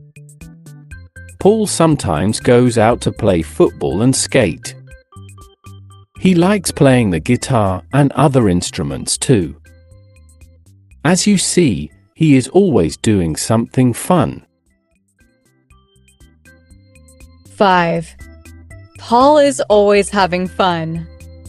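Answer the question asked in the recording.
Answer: True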